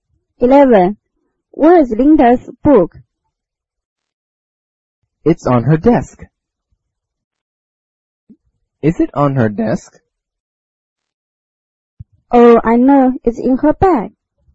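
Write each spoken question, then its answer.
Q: Where is Linda's book?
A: In her bag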